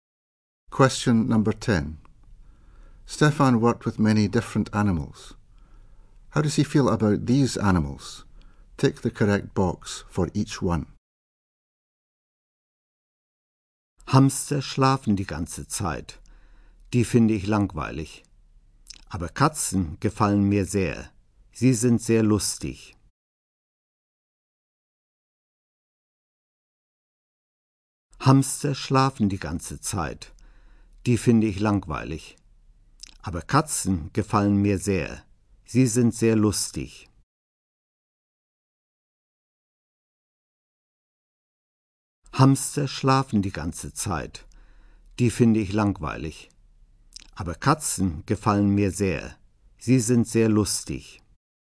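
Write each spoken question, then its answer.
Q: How does he feel about these animals?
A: Hamsters boring; he really likes cats (funny)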